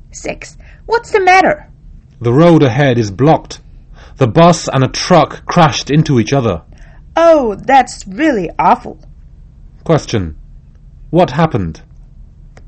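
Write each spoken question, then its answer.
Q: What happened?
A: A bus and a truck crashed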